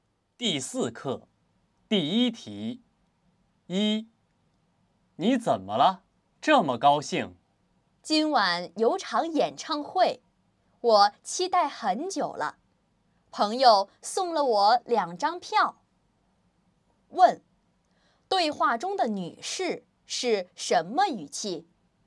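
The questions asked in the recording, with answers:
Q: 对话中的女士是什么语气?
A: 高兴、期待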